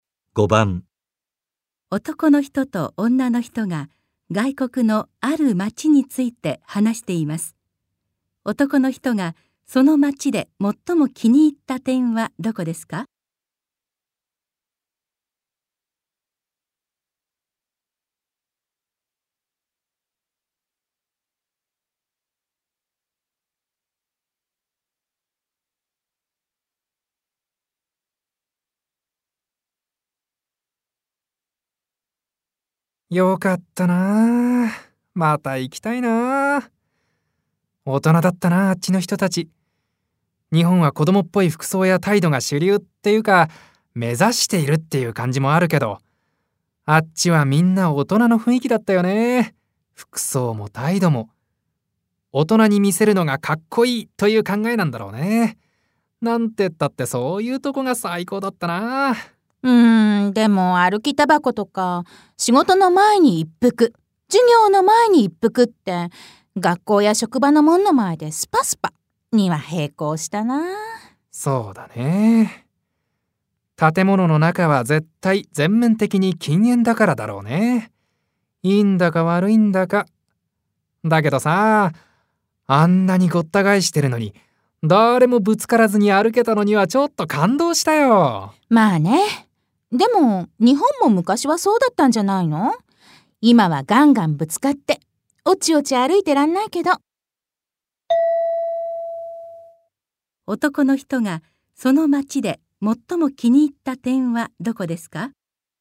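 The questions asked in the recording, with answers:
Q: 男の人がその町で最も気に入った点はどこですか?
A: 人々の服装や態度が大人っぽい雰囲気なところ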